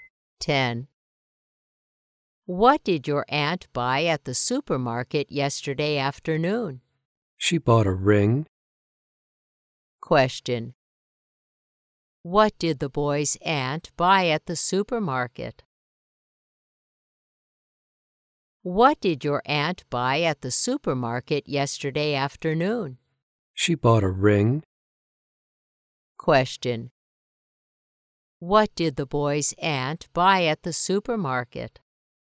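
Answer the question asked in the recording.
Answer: A ring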